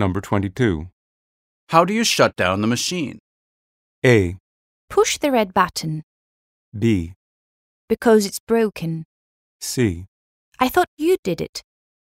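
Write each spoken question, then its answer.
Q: How do you shut down the machine?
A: A: Push the red button.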